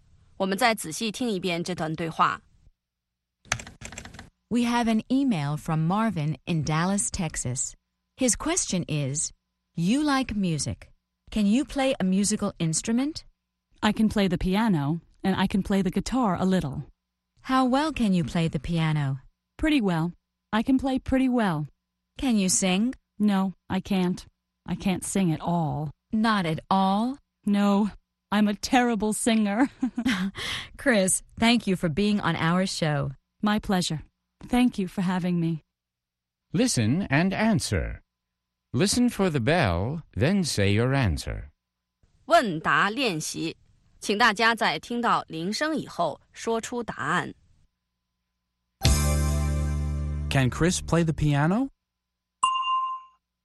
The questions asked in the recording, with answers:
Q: Can Chris play the piano?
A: Yes, she can. She can play the piano pretty well.